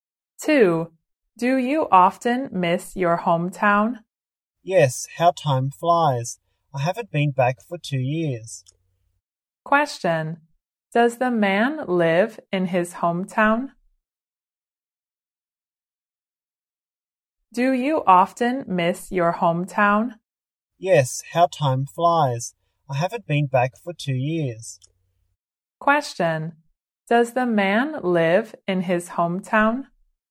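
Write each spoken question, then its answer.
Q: Does the man live in his hometown?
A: No.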